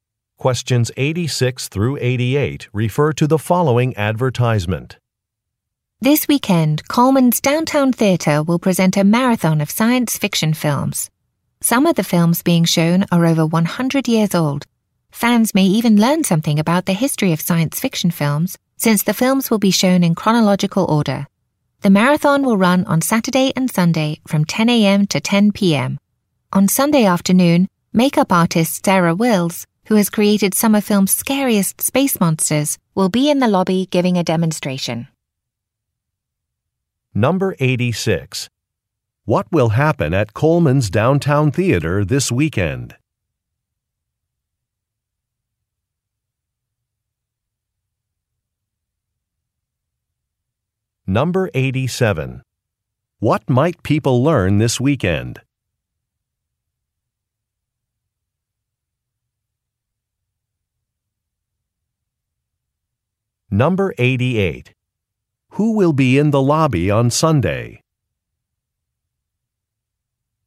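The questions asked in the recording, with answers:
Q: What will happen at Coleman's Downtown Theater this weekend?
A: A science fiction film marathon

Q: What might people learn this weekend?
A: The history of science fiction films

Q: Who will be in the lobby on Sunday?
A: A makeup artist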